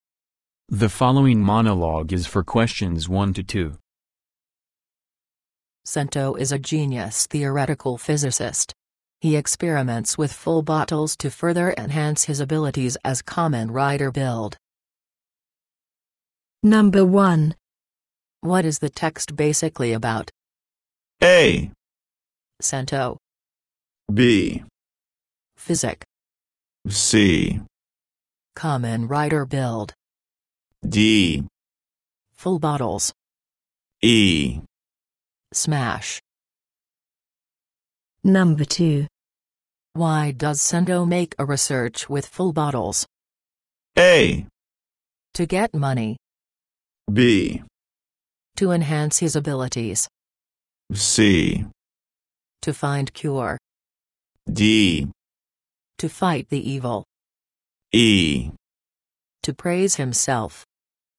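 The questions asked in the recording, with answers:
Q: Why does Cento make a research with full bottles?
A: B: To enhance his abilities.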